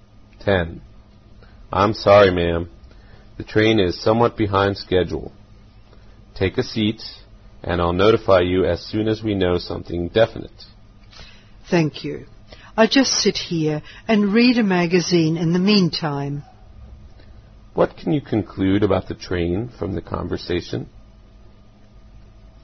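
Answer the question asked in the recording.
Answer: It is late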